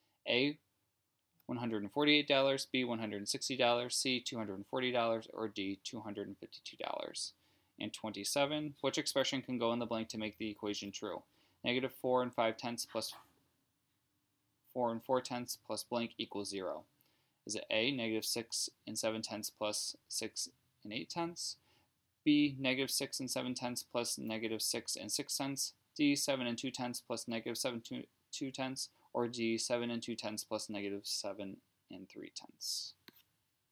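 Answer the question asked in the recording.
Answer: A: negative 6 and 7 tenths plus 6 and 8 tenths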